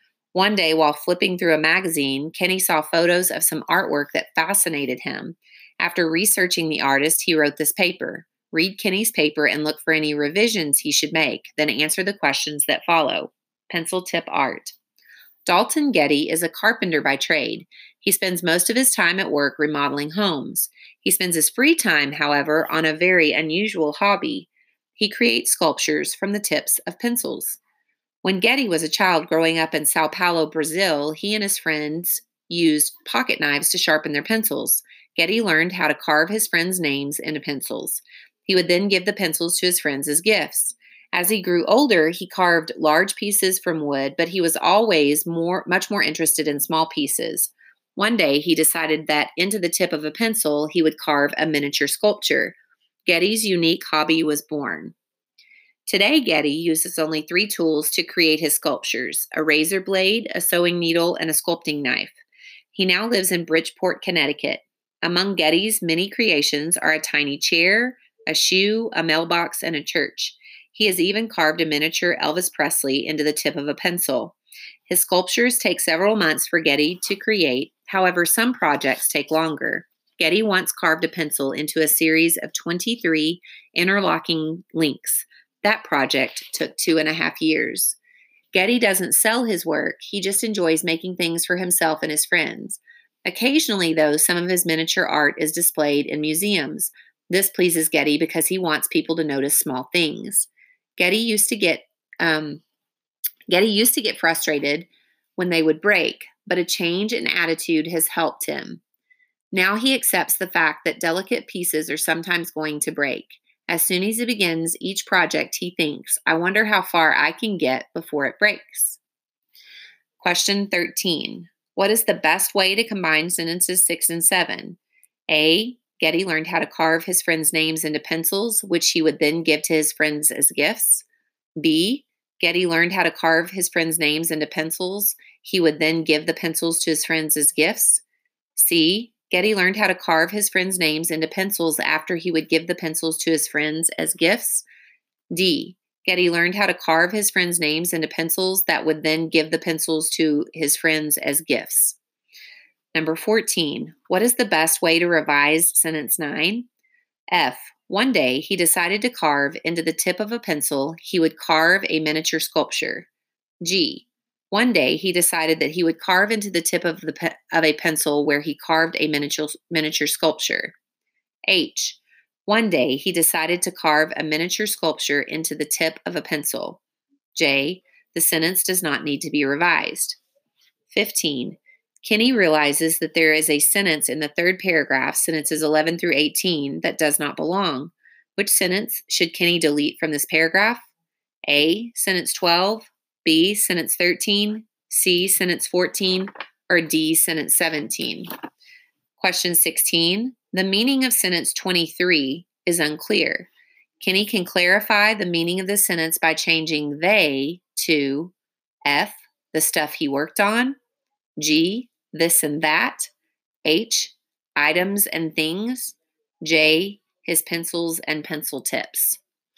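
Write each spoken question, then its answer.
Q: What is the best way to combine sentences 6 and 7?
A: A: Getty learned how to carve his friends' names into pencils, which he would then give to his friends as gifts.

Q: What is the best way to revise sentence 9?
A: H: One day, he decided to carve a miniature sculpture into the tip of a pencil.

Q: Kenny can clarify the meaning of the sentence by changing they to F, the stuff he worked on, G, this and that, H, items and things, J, his pencils and pencil tips.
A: J: his pencils and pencil tips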